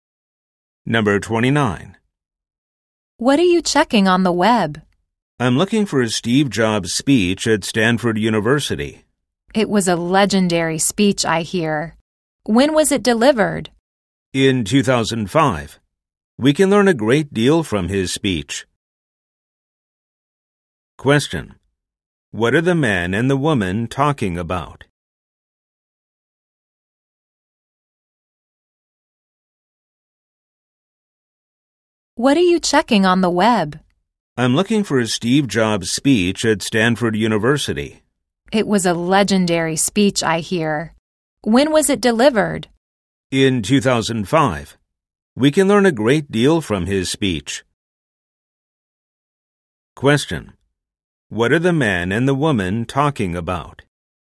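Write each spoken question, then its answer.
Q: What are the man and the woman talking about?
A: A Steve Jobs speech at Stanford University (delivered in 2005)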